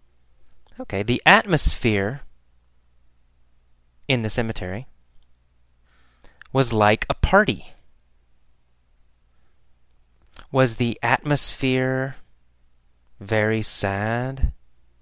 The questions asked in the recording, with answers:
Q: Was the atmosphere Very sad?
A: No, no, the atmosphere was not sad.